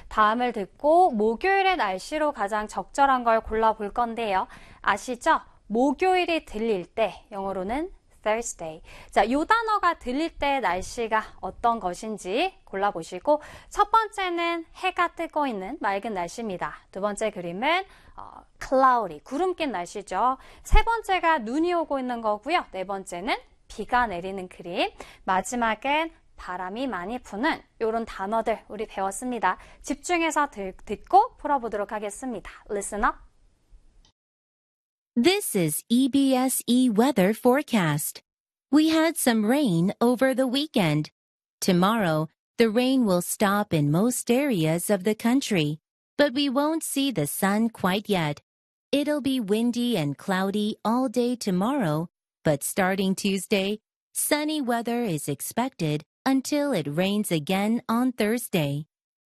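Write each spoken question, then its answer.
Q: 다음을 듣고 목요일의 날씨로 가장 적절한 걸 골라볼 건데요.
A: 4: 비가 내리는 날씨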